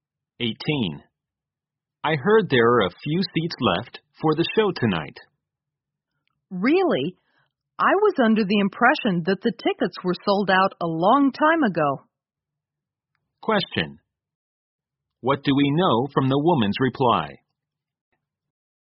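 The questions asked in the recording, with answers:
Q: What do we know from the woman's reply?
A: She thought the tickets had sold out long ago, so she is surprised.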